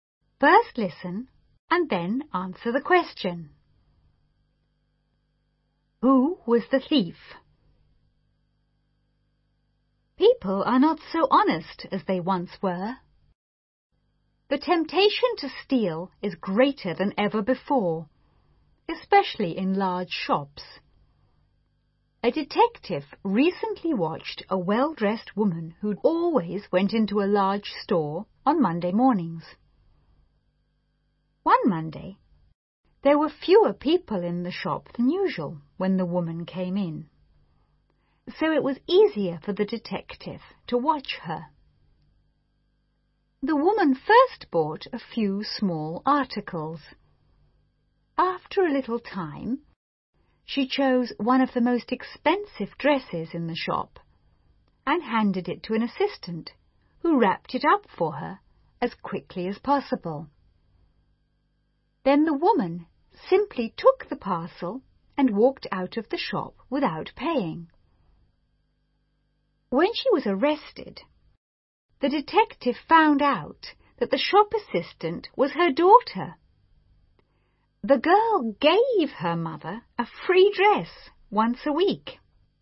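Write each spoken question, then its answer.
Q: Who was the thief?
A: The shop assistant (the woman's daughter), along with her mother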